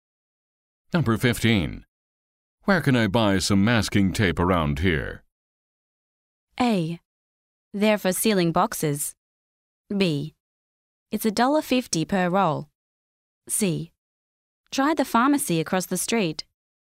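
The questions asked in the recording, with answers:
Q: Where can I buy some masking tape around here?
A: C: Try the pharmacy across the street.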